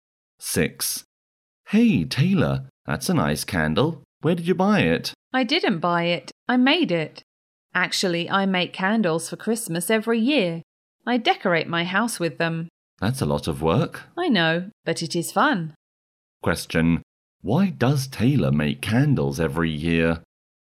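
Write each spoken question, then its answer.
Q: Why does Taylor make candles every year?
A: To decorate her house for Christmas; it is fun.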